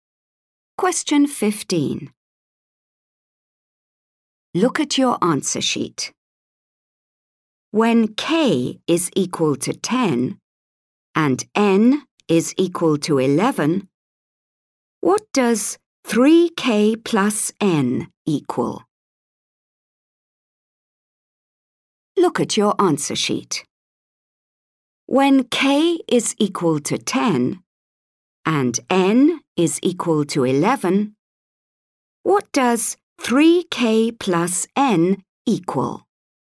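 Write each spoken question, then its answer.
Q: When k is equal to 10 and n is equal to 11, what does 3k plus n equal?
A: 41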